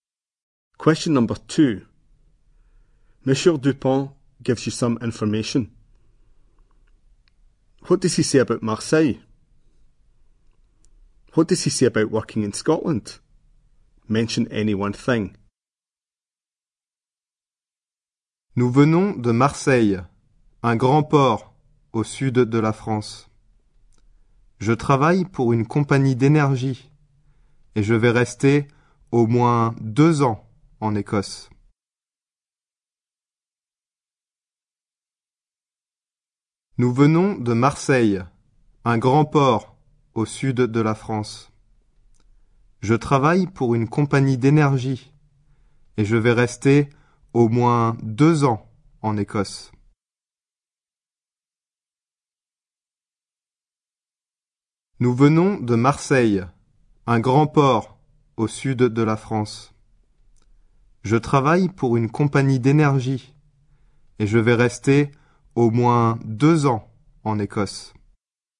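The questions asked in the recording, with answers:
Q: What does he say about Marseille?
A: It is a big port in the south of France

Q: What does he say about working in Scotland?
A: He works for an energy company and will stay at least 2 years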